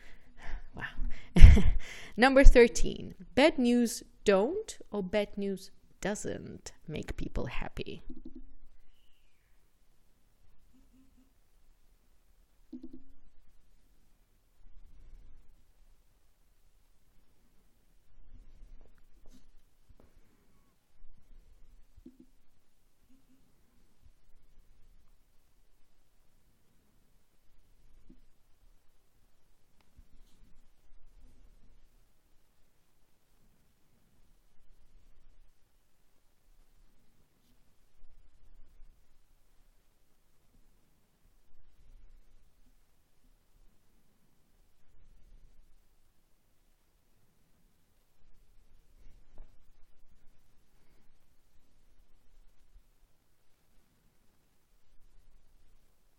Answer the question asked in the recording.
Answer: Therefore, bad news doesn't make people happy.